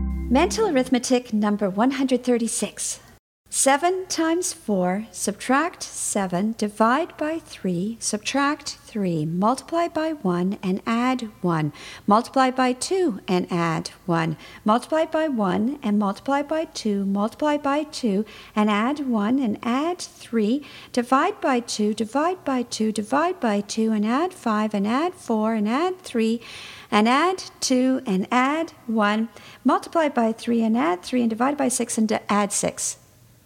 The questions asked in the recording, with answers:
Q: 7 times 4, subtract 7, divide by 3, subtract 3, multiply by 1 and add 1, multiply by 2 and add 1, multiply by 1 and multiply by 2, multiply by 2 and add 1 and add 3, divide by 2, divide by 2, divide by 2 and add 5 and add 4 and add 3 and add 2 and add 1, multiply by 3 and add 3 and divide by 6 and add 6.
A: And your answer is 17.